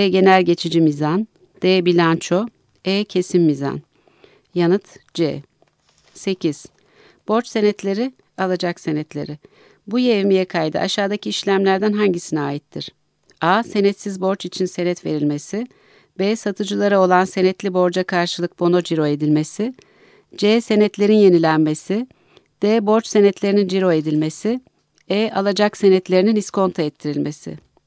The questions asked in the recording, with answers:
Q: Bu yevmiye kaydı aşağıdaki işlemlerden hangisine aittir?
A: Yanıt B.